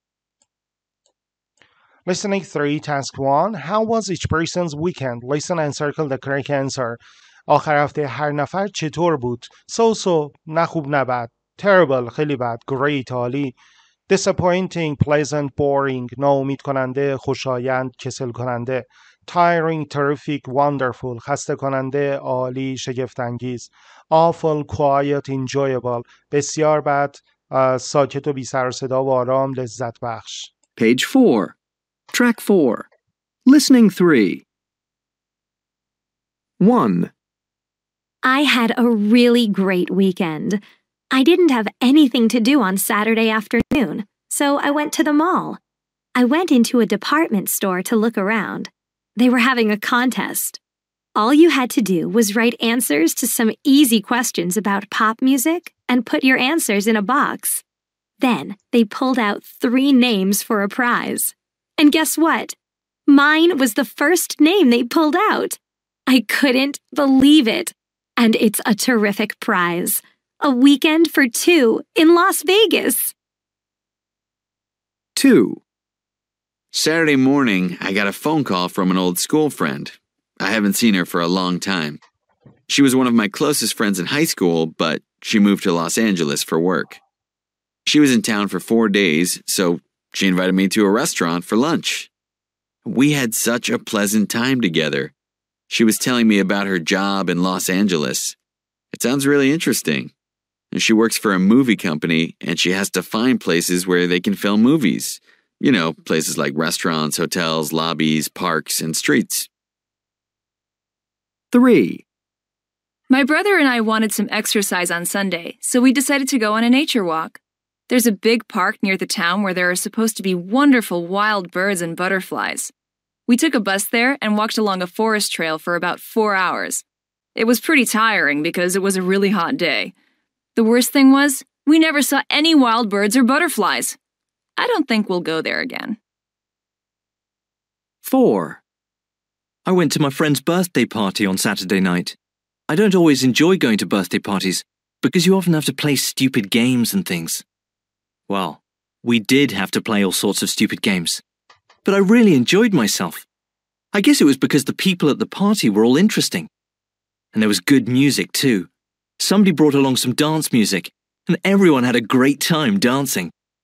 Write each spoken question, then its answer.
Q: How was each person's weekend?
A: 1C

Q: How was each person's weekend?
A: 2B

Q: How was each person's weekend?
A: 3A

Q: How was each person's weekend?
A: 4C